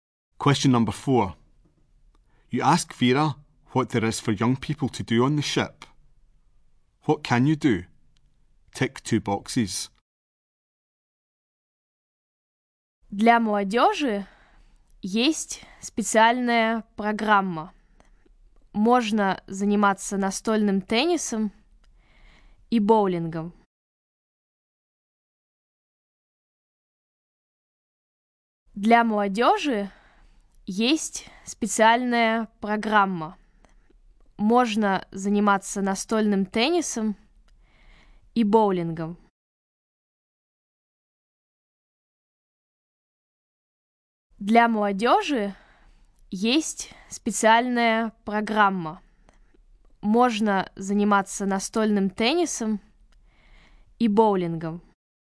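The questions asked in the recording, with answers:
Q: What can you do? Tick two boxes.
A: Table tennis and bowling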